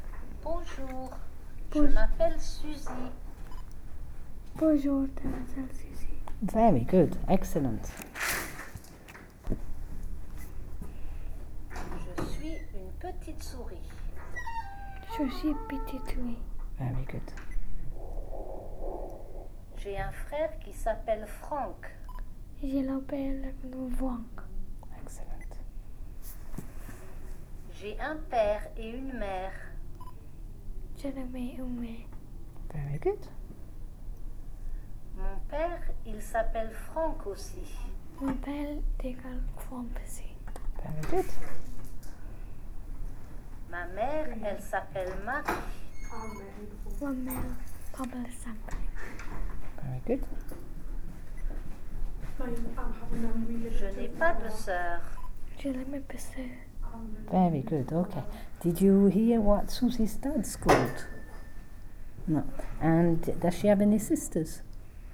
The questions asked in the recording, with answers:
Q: And does she have any sisters?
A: So she hasn't got any sisters.